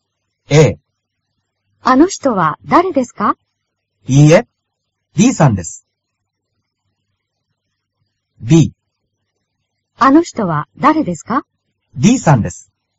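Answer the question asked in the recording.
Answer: B: D さんです。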